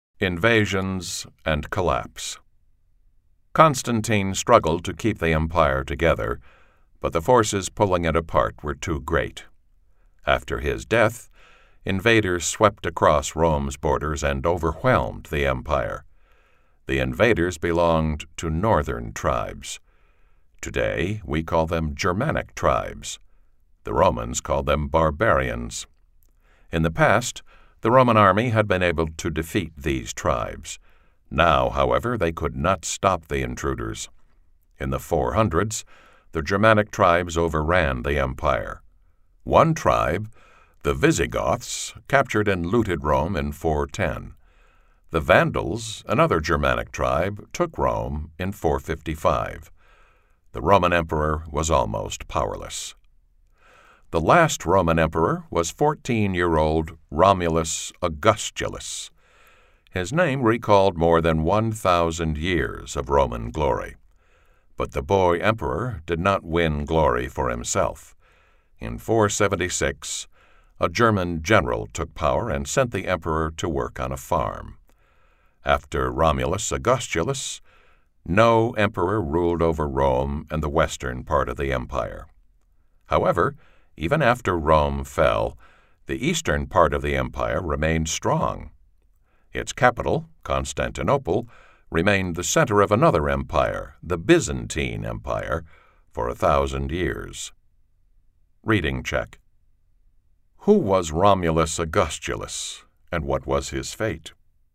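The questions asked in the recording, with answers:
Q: Who was Romulus Augustulus, and what was his fate?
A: The last Roman emperor, a 14-year-old boy; in 476 a German general took power and sent him to work on a farm.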